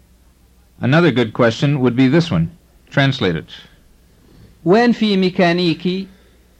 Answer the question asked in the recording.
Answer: It means, where is there a mechanic?